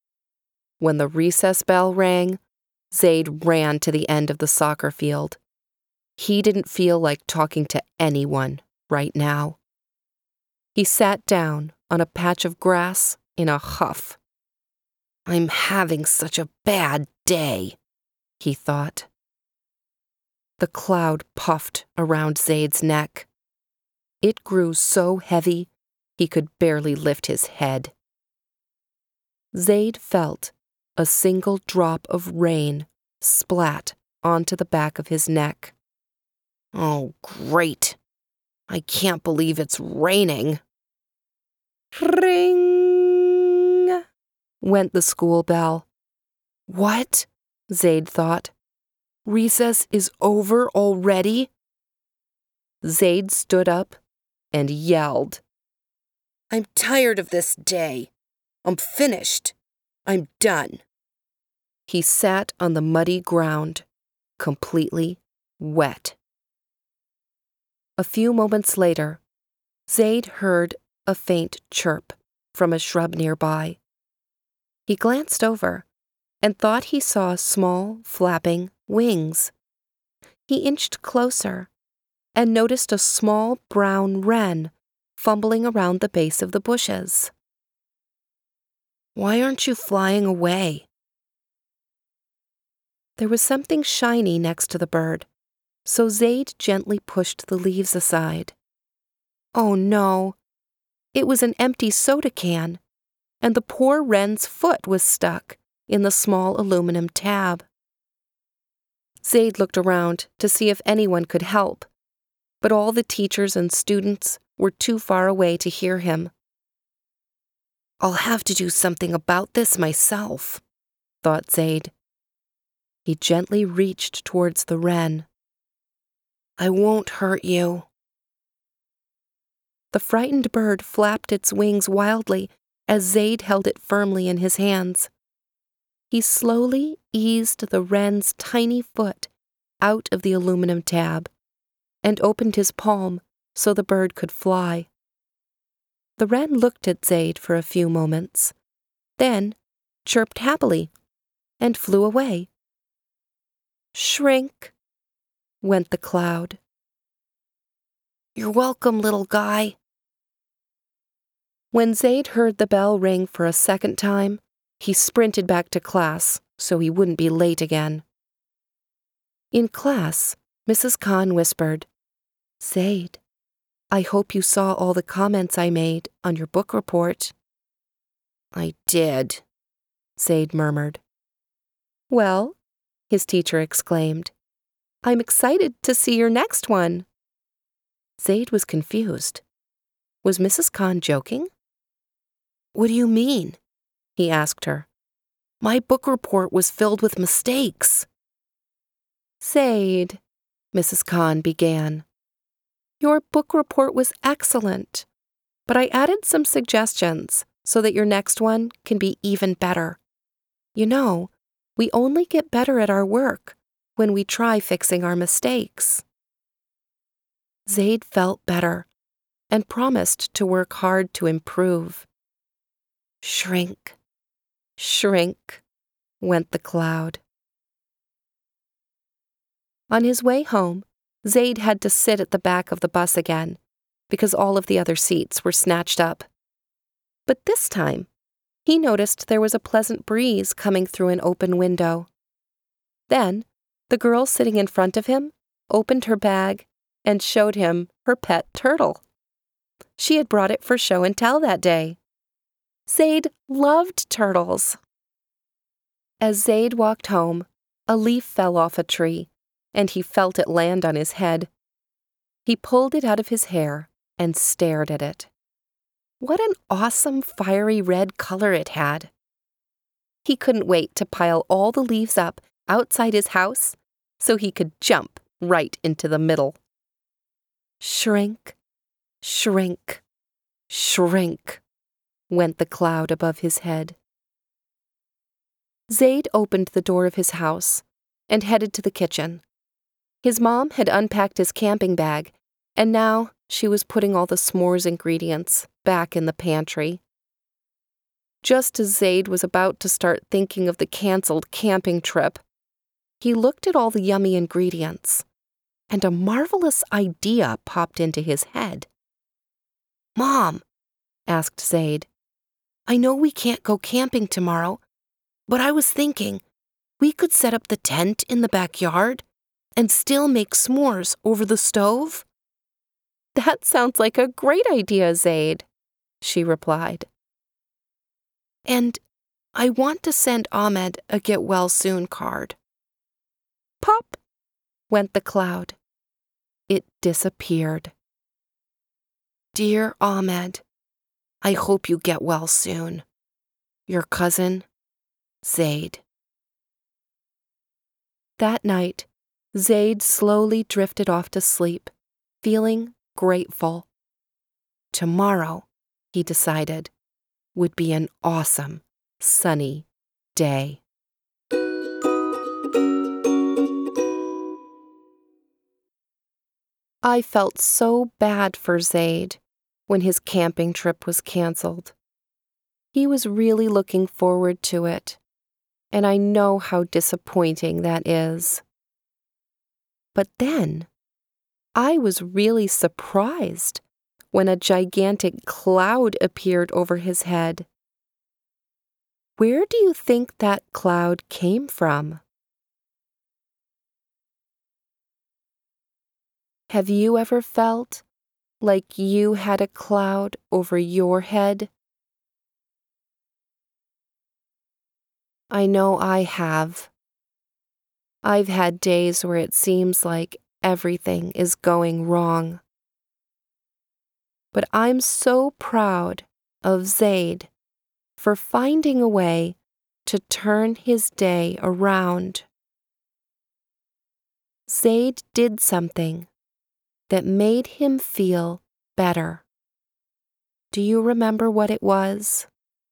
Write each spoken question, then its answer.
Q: Zaid did something that made him feel better. Do you remember what it was?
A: I'm sure he made the little bird feel better too.